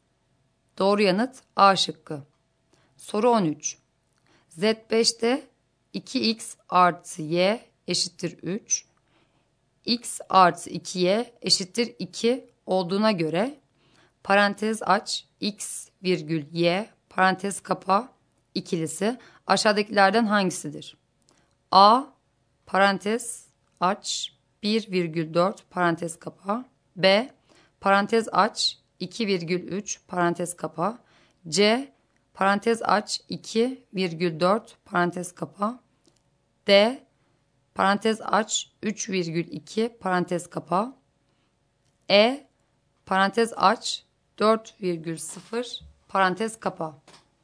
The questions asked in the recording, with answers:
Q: Z5'te 2x artı y eşittir 3, x artı 2y eşittir 2 olduğuna göre parantez aç x virgül y parantez kapa ikilisi aşağıdakilerden hangisidir?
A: Doğru yanıt D şıkkı.